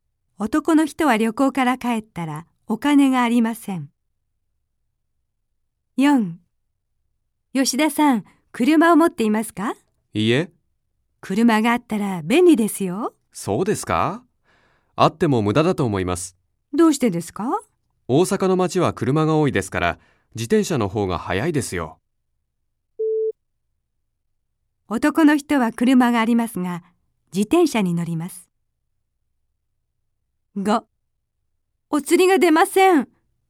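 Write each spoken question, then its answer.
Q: 男の人は車がありますが、自転車に乗ります。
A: ×(車を持っていない)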